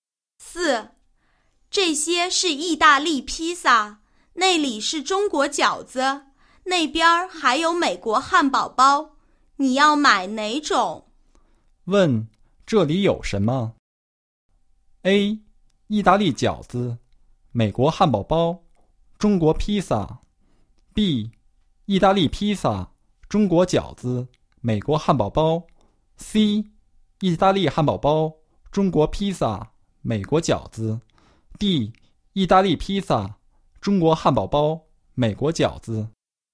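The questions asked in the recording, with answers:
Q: 问,这里有什么?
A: B: 意大利披萨,中国饺子,美国汉堡包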